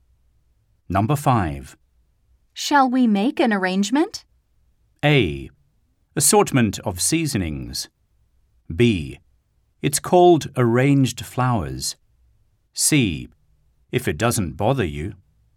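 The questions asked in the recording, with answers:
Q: Shall we make an arrangement?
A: C: If it doesn't bother you.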